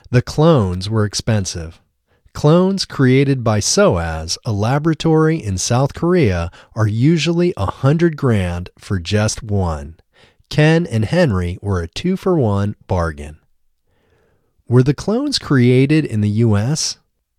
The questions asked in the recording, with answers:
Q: Were the clones created in the U.S.?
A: No, the clones weren't created in the U.S.